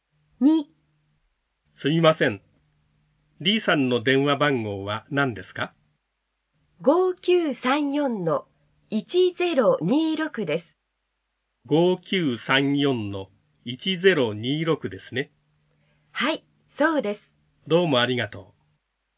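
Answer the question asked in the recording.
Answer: 5934-1026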